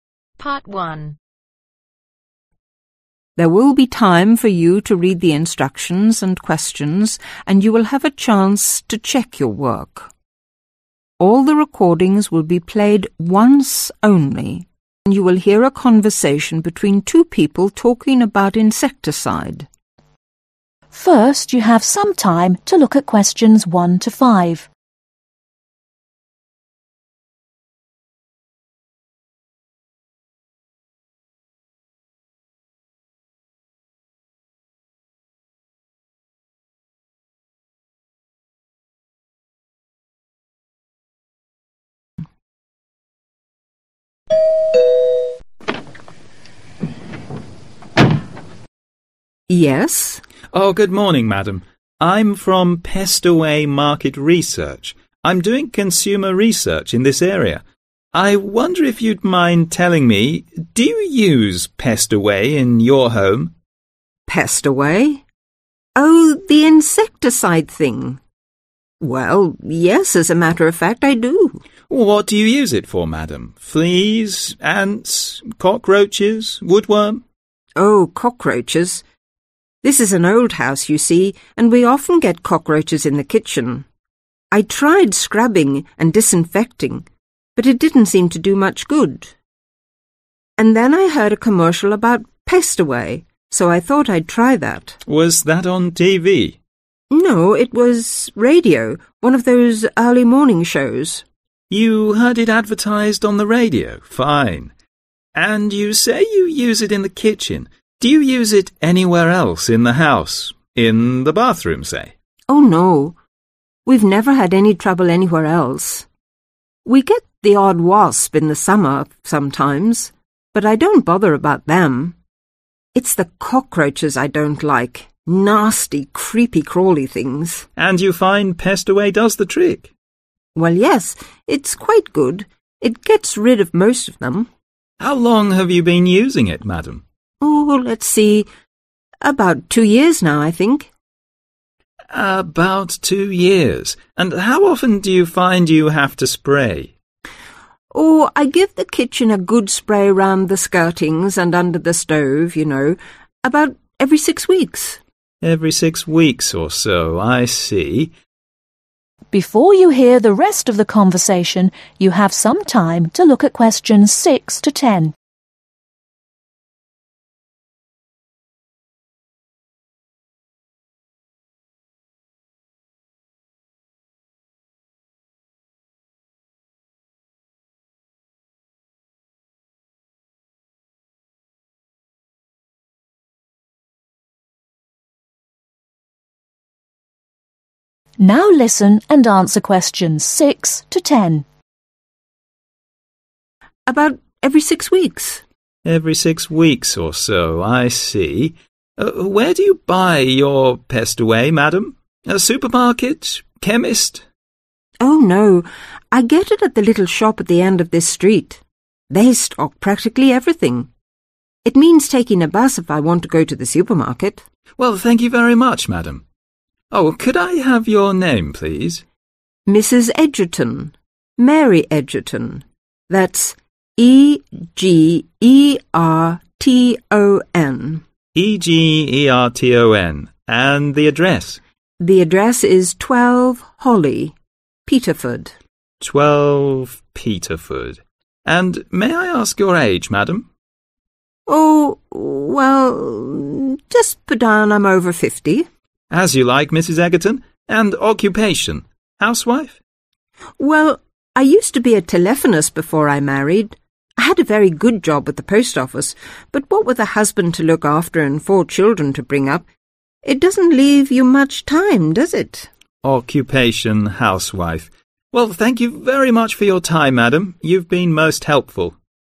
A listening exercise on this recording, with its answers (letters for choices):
Circle the correct letters.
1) Why did you buy Pestaway ?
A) cockroaches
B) fleas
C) ants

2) How did you first hear about Pestaway ?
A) friend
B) advertisement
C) radio advertisement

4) How long has the woman been using Pestaway ?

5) How often does she use it ?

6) Where did you buy it ?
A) supermarket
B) chemist's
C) department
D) corner shop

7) Name : ............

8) Address : ............ holly Peterford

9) Age : ............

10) Occupation : ............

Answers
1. A
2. C
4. 2 Years
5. 6 Weeks
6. D
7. Mary Egerton
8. 12
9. (Over) 50
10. House Wife